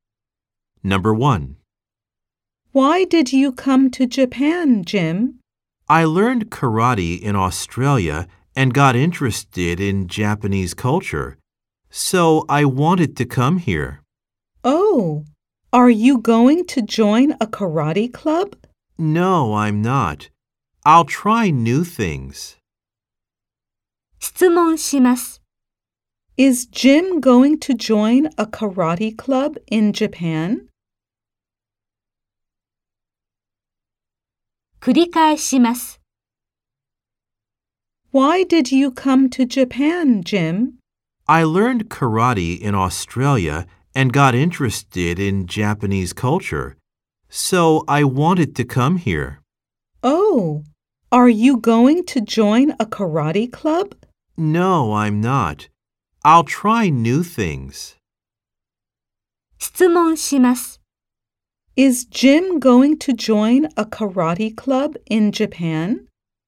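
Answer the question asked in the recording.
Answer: No, he isn't.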